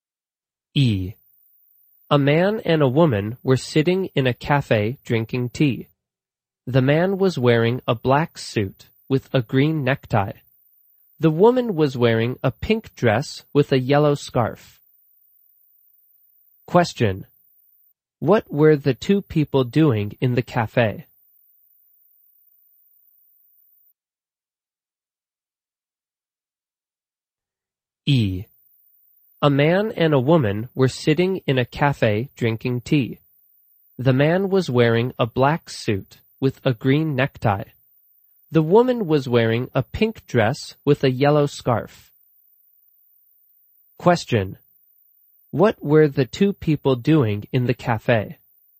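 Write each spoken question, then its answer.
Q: What were the two people doing in the cafe?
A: Drinking tea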